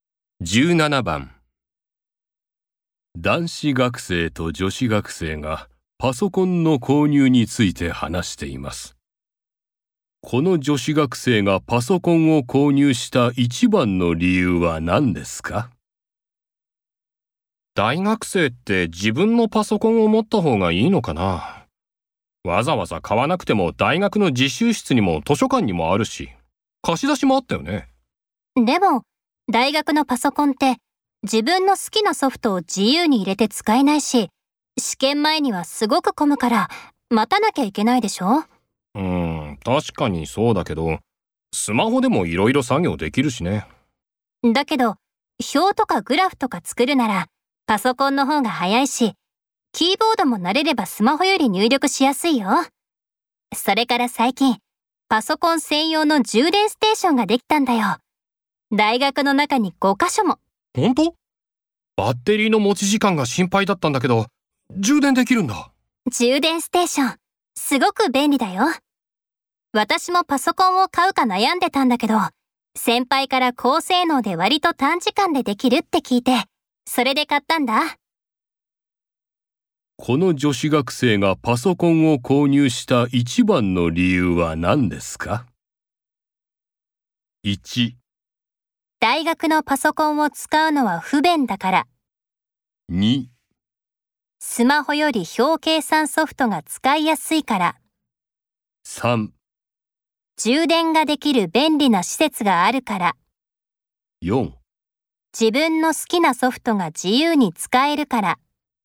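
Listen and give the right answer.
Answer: 3: 充電ができる便利な施設があるから。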